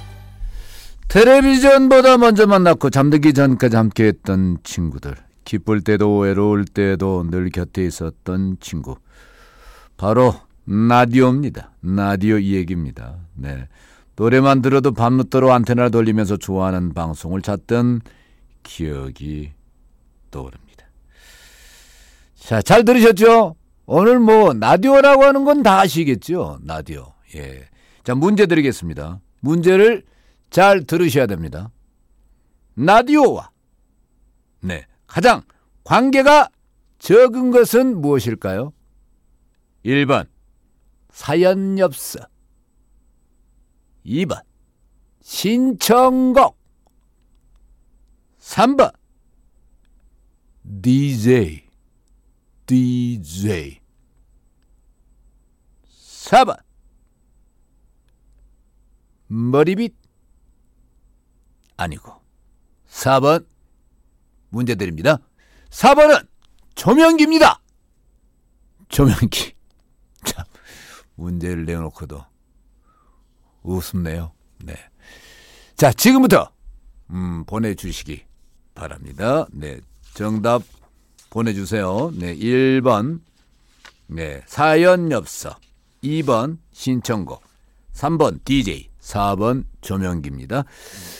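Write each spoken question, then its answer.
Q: 라디오와 네, 가장 관계가 적은 것은 무엇일까요?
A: 4번: 조명기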